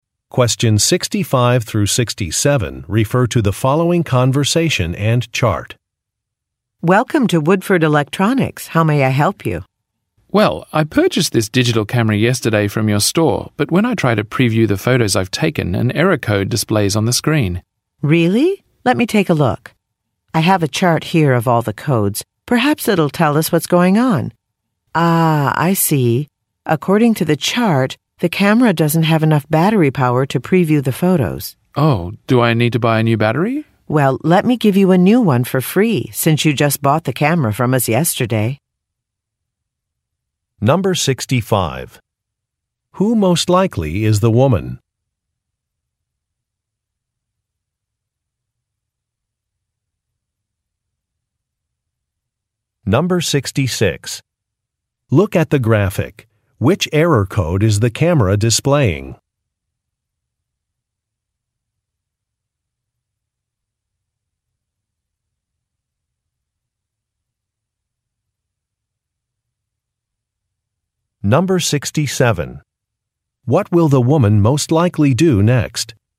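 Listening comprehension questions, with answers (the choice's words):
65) Who most likely is the woman?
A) A workshop instructor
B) A store clerk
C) An electrician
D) A product designer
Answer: A store clerk

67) What will the woman most likely do next?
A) Replace an item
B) Take a photograph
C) Read a manual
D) Show some slides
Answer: Replace an item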